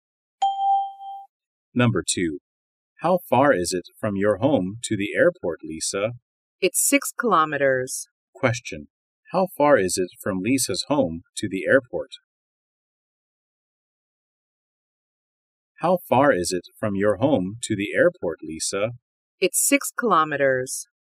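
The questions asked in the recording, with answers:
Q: How far is it from Lisa's home to the airport?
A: 6 kilometers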